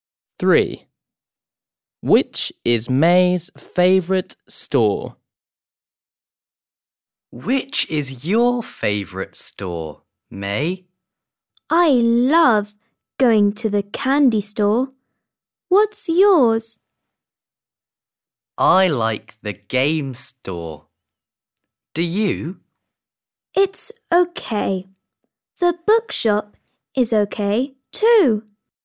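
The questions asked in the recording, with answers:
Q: Which is May's favourite store?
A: the candy store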